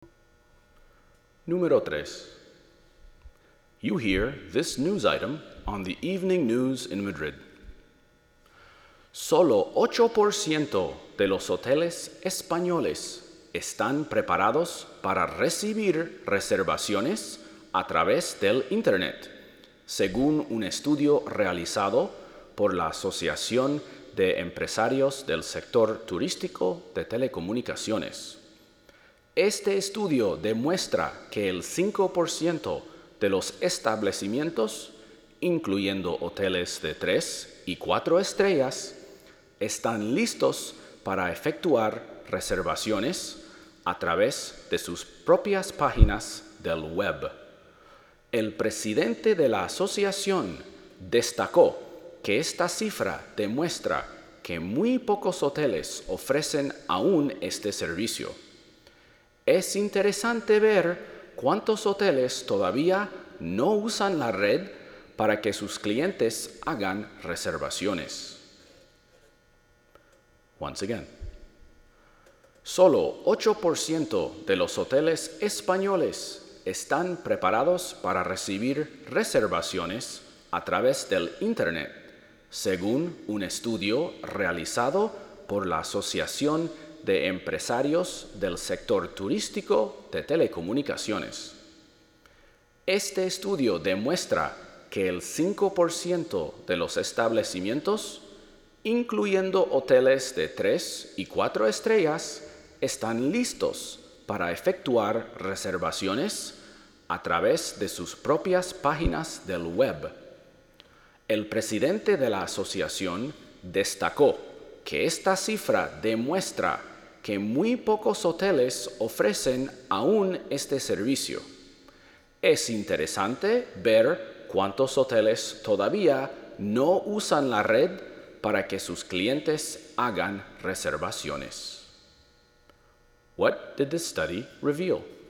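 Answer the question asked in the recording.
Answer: Very few Spanish hotels (only 8%) are ready to take reservations over the Internet.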